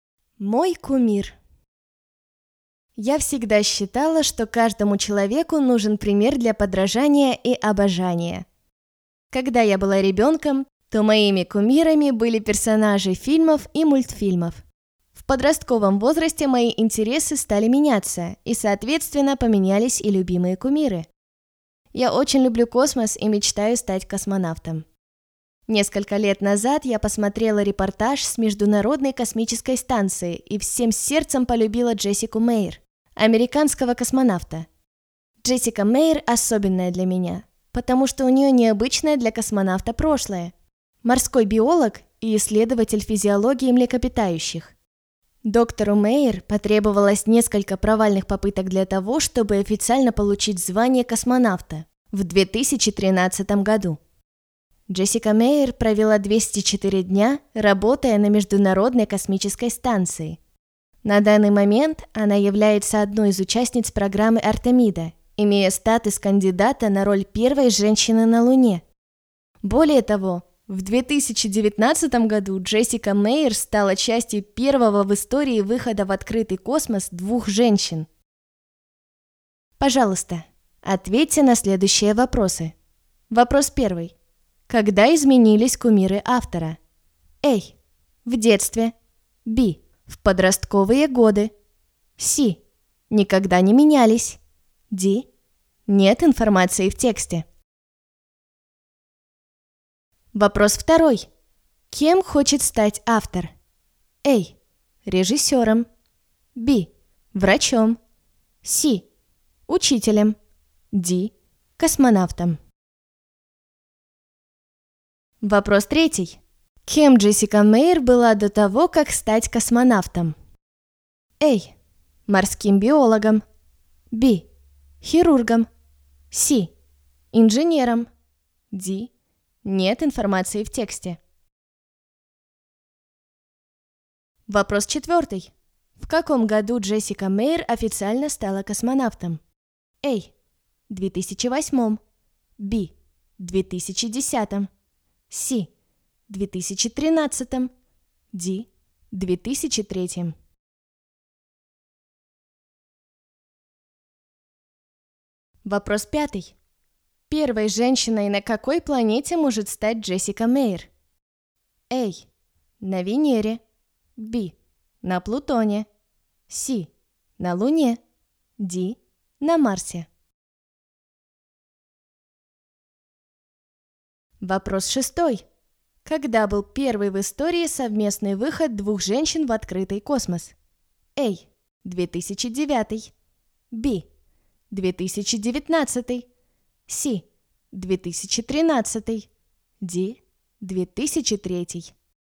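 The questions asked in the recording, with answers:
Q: Когда изменились кумиры автора?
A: B: В подростковые годы.

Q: Кем хочет стать автор?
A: D: Космонавтом.

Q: Кем Джессика Мейер была до того, как стать космонавтом?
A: A: Морским биологом.

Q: В каком году Джессика Мейер официально стала космонавтом?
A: C: 2013.

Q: Первой женщиной на какой планете может стать Джессика Мейер?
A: C: На Луне.

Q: Когда был первый в истории совместный выход двух женщин в открытый космос?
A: B: 2019.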